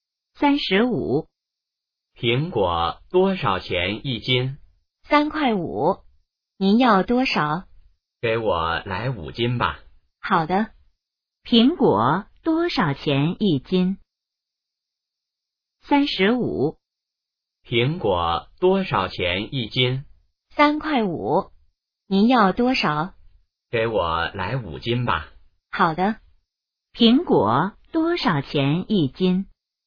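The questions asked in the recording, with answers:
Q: 苹果多少钱一斤?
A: 3.5元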